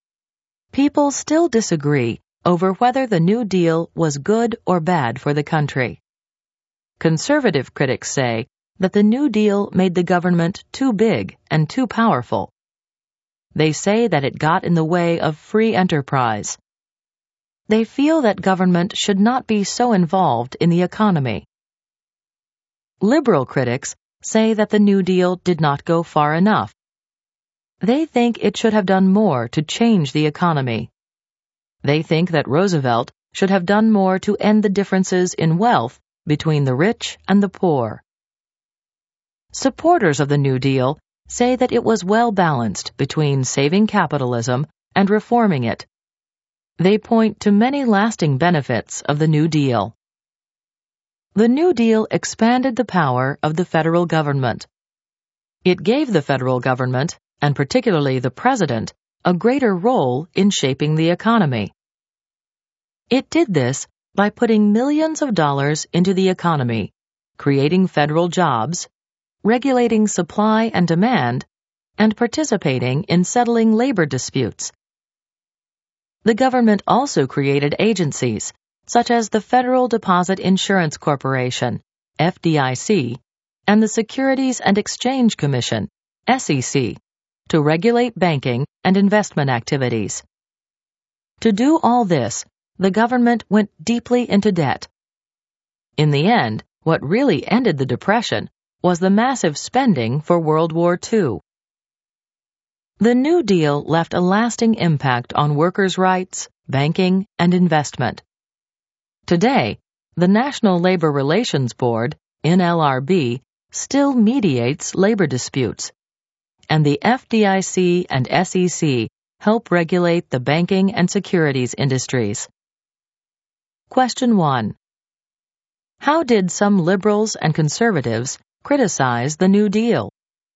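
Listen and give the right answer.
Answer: Conservatives said it made government too big and powerful and hurt free enterprise; liberals said it did not go far enough to change the economy and reduce wealth gaps.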